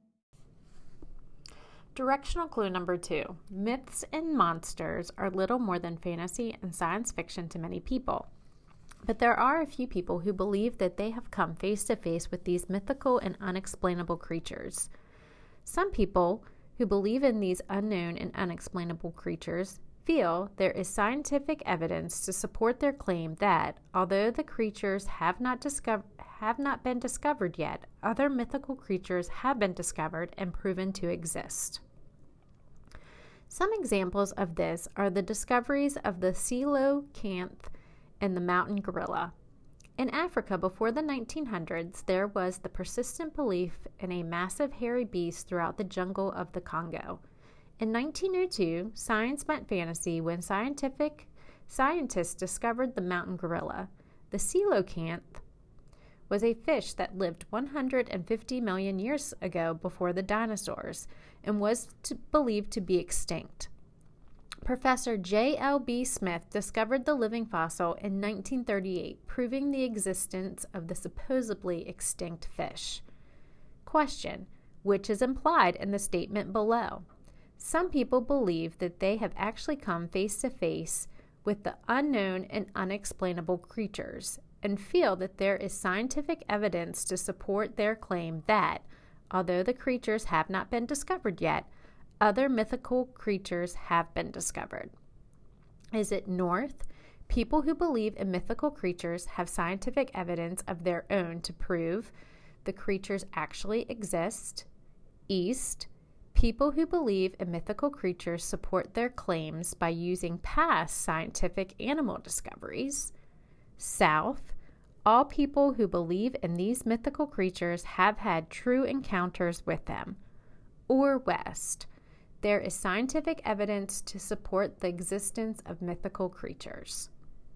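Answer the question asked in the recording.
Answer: East: People who believe in mythical creatures support their claims by using past scientific animal discoveries.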